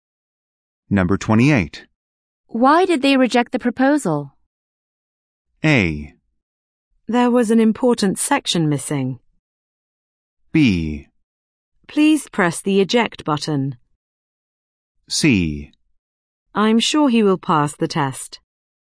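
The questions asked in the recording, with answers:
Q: Why did they reject the proposal?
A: A: There was an important section missing.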